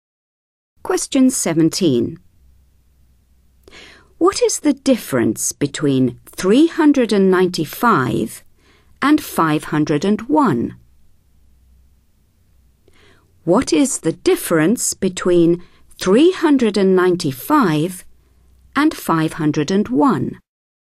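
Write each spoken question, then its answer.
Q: What is the difference between 395 and 501?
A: 106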